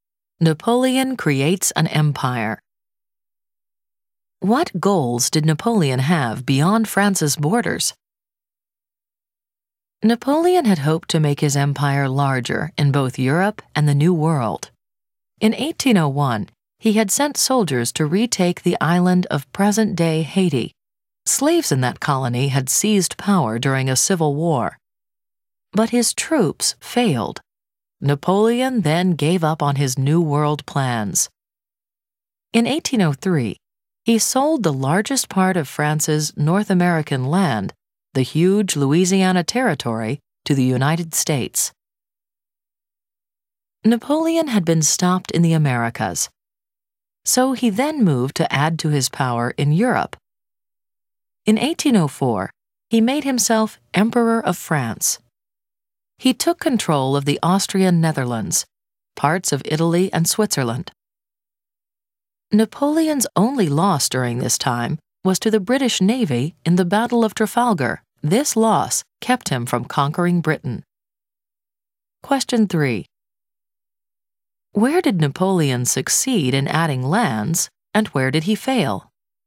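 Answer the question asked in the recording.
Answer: He succeeded in Europe (Austrian Netherlands, parts of Italy and Switzerland) but failed in the Americas (Haiti) and against Britain (Trafalgar).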